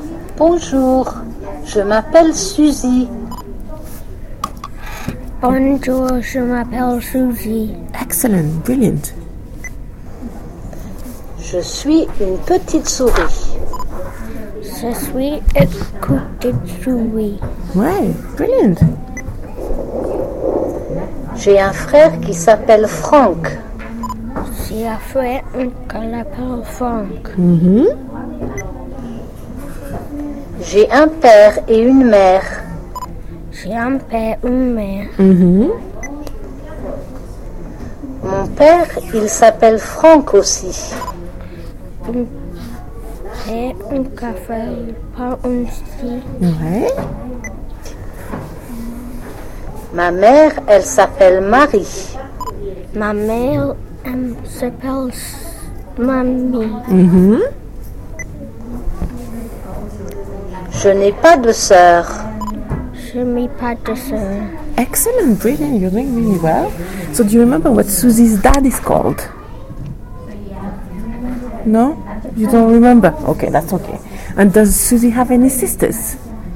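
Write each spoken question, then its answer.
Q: So do you remember what Susie's dad is called?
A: Franck

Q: And does Susie have any sisters?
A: No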